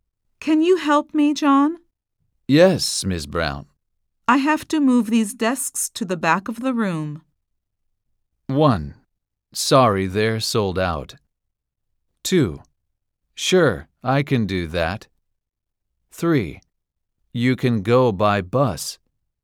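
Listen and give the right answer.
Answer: 2: Sure, I can do that.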